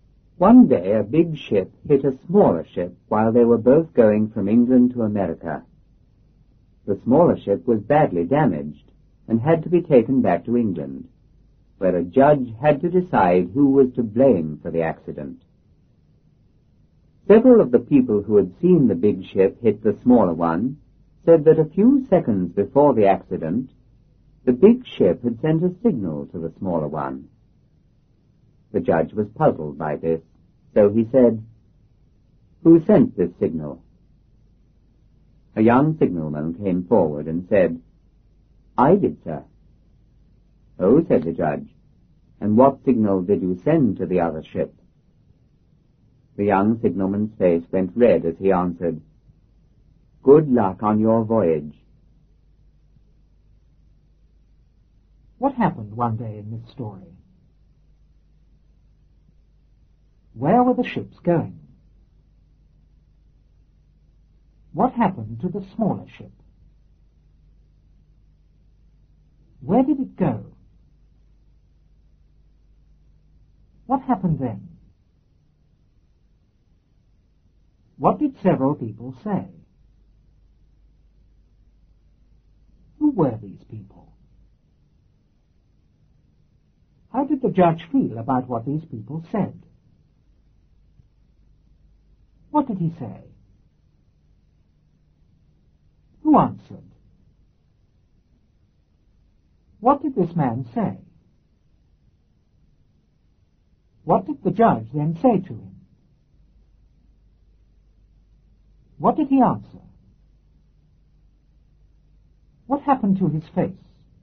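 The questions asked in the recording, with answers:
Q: What happened one day in this story?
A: A big ship hit a smaller ship.

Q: Where were the ships going?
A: From England to America.

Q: What happened to the smaller ship?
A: It was badly damaged.

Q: Where did it go?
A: Back to England.

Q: What happened then?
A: A judge had to decide who was to blame for the accident.

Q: What did several people say?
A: That the big ship had sent a signal to the smaller one a few seconds before the accident.

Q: Who were these people?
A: People who had seen the big ship hit the smaller one.

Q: How did the judge feel about what these people said?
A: He was puzzled.

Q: What did he say?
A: "Who sent this signal?"

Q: Who answered?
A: A young signalman.

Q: What did this man say?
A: "I did, sir."

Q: What did the judge then say to him?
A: "What signal did you send to the other ship?"

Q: What did he answer?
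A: "Good luck on your voyage."

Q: What happened to his face?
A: It went red.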